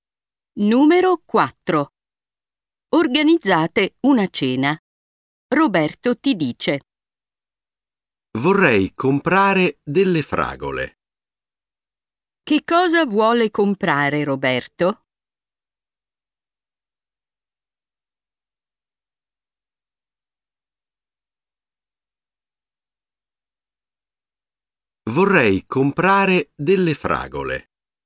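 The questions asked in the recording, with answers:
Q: Che cosa vuole comprare Roberto?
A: delle fragole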